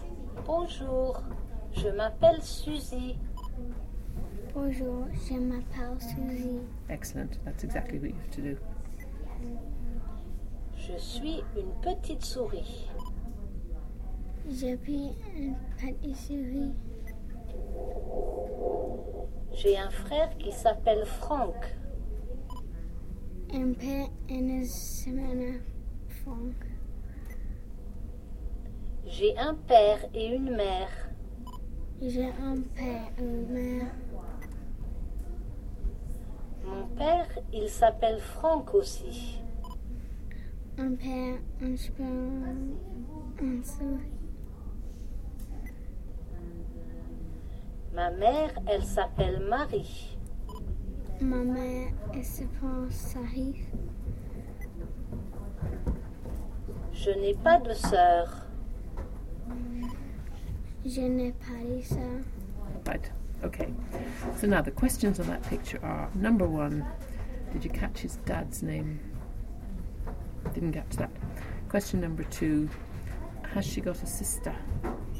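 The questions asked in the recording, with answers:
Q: did you catch his dad's name?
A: Franck

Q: has she got a sister?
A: No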